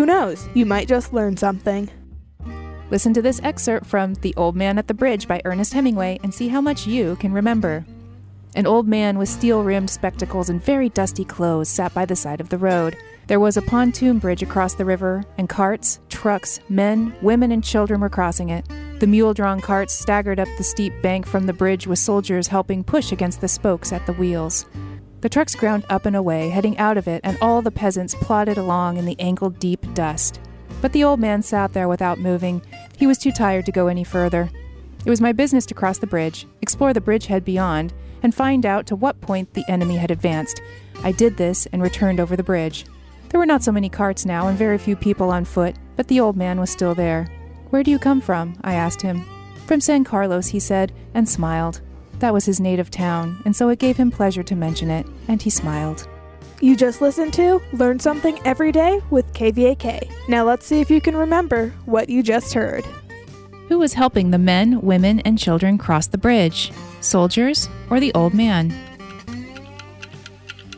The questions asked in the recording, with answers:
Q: Who was helping the men, women, and children cross the bridge?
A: Soldiers were helping them.